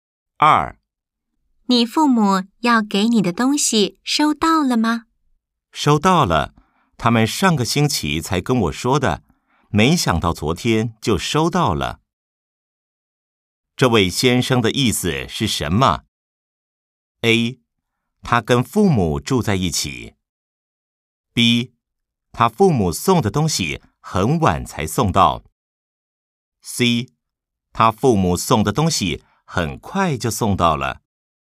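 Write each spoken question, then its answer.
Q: 这位先生的意思是什么? A. 他跟父母住在一起。 B. 他父母送的东西很晚才送到。 C. 他父母送的东西很快就送到了。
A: C: 他父母送的东西很快就送到了。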